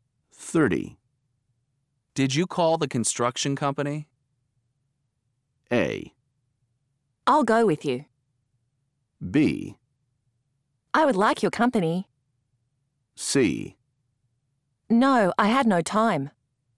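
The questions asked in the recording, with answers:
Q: Did you call the construction company?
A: C: No, I had no time.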